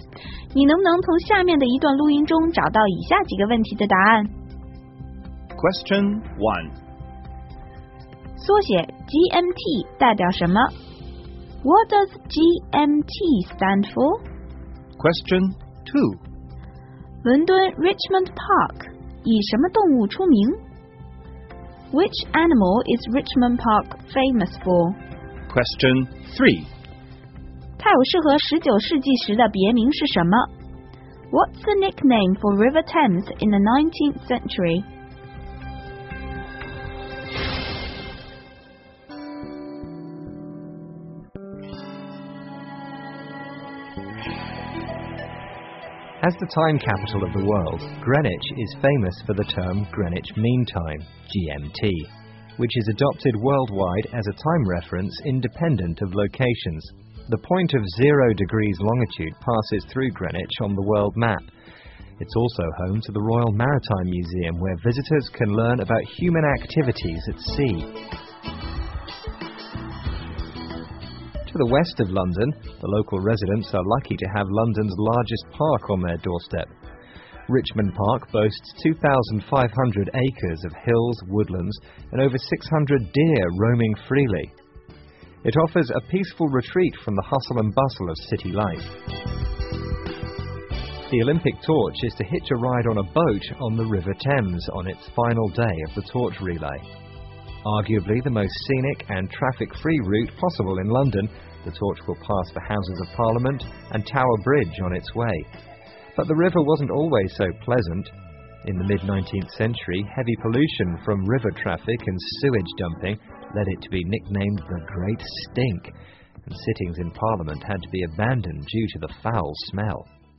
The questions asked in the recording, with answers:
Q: 缩写 GMT 代表什么? What does GMT stand for?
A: GMT 是 Greenwich Mean Time 的缩写

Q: Which animal is Richmond Park famous for?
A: 这里的鹿是最出名的

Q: What's the nickname for River Thames in the 19th century?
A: 所以被称为 Great Stink, 超级臭河